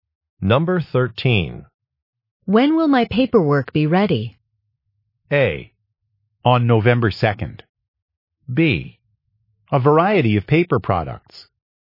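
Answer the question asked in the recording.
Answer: A: On November 2nd.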